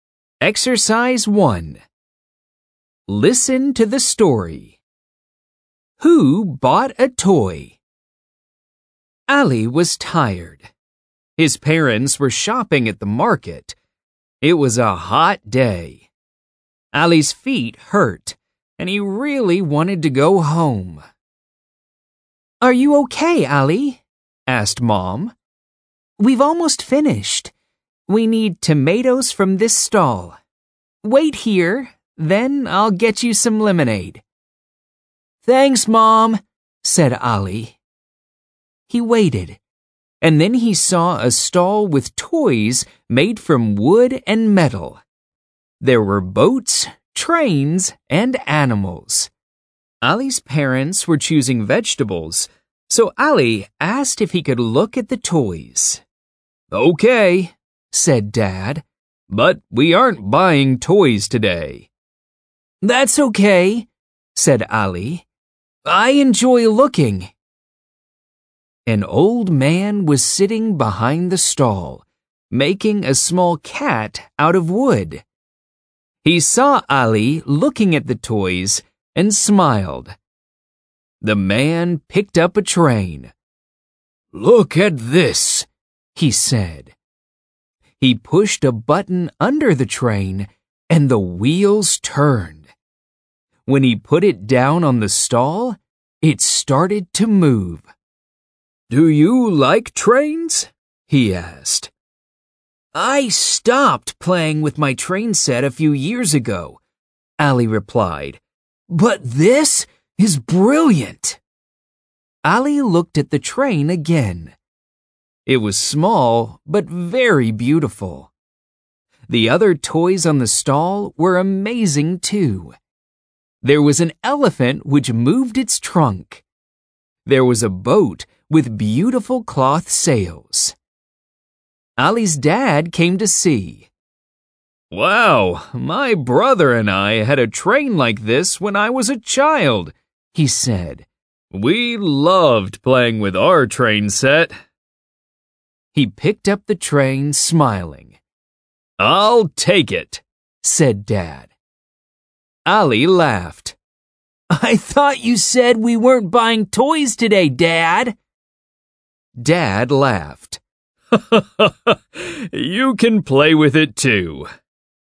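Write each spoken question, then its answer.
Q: Who bought a toy?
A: Ali's dad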